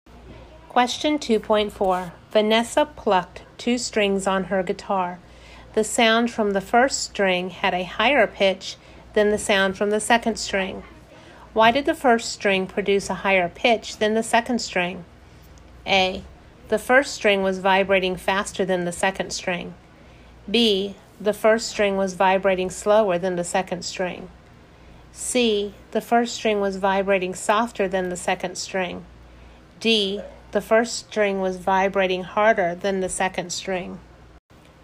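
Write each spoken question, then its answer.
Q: Why did the first string produce a higher pitch than the second string?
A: A: The first string was vibrating faster than the second string.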